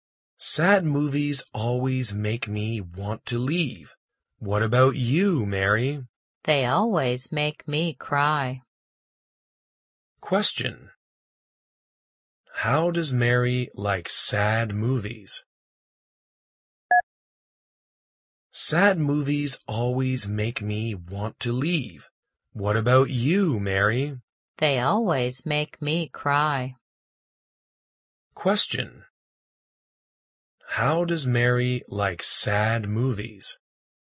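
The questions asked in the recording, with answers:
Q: How does Mary like sad movies?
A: They always make her cry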